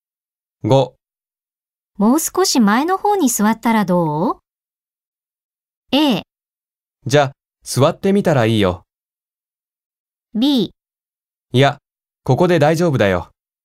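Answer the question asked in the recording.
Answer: B: いや、ここで大丈夫だよ。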